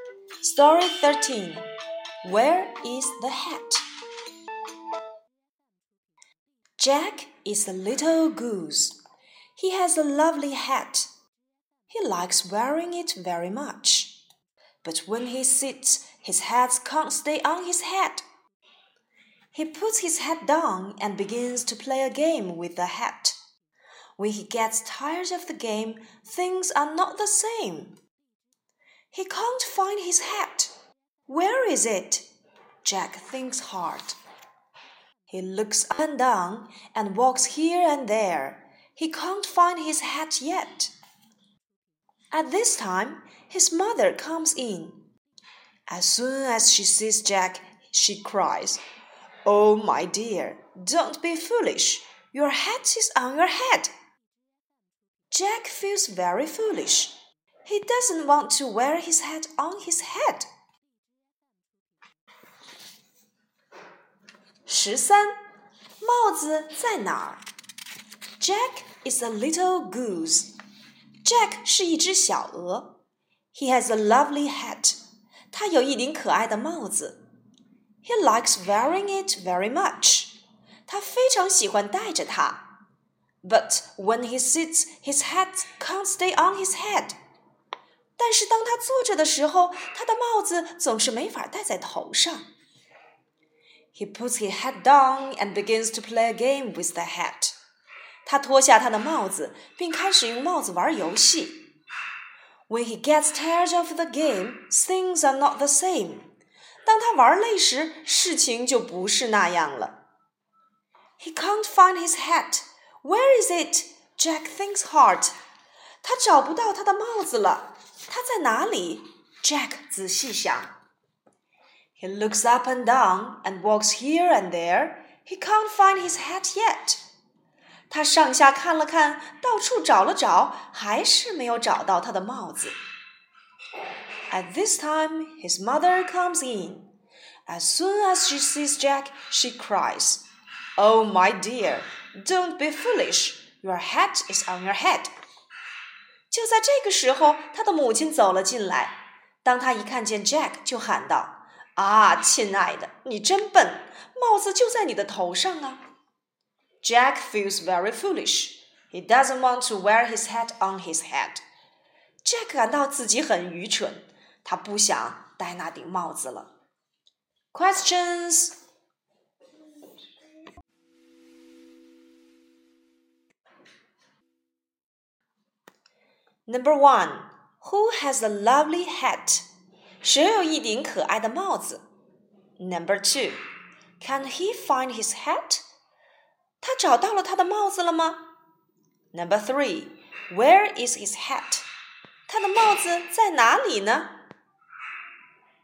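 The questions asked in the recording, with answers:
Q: who has a lovely hat?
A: Jack, the little goose

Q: can he find his hat?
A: No, he can't

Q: where is his hat?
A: On his head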